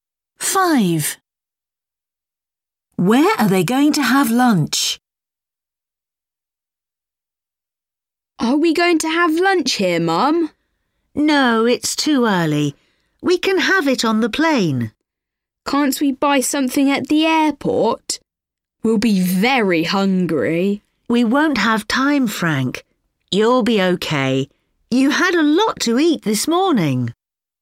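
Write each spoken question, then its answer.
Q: Where are they going to have lunch?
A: On the plane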